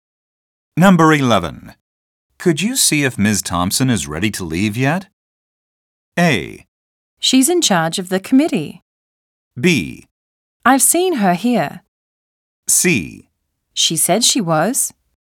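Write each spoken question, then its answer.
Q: Could you see if Ms.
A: C: She said she was.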